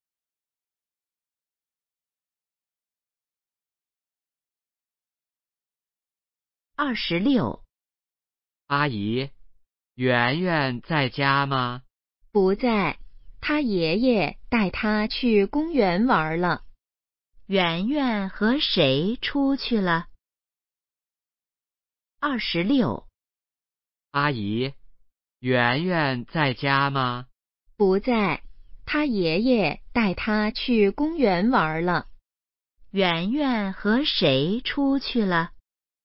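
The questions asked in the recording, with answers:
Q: 圆圆和谁出去了?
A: 爷爷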